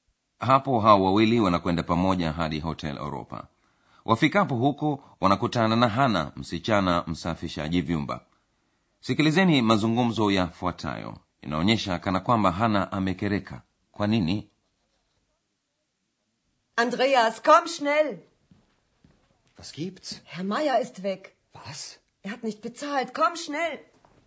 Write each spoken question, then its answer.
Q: inaonyesha kana kwamba hana amekereka kwa nini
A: hana amekereka kwa sababu mmojawapo wa wageni hermaya ameondoka